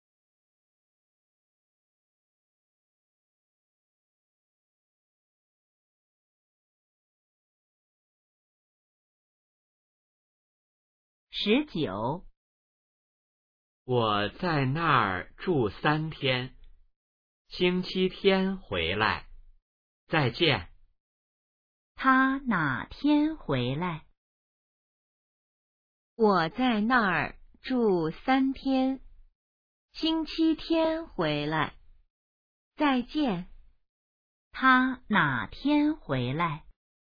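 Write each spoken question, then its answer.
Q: 他哪天回来?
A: 星期天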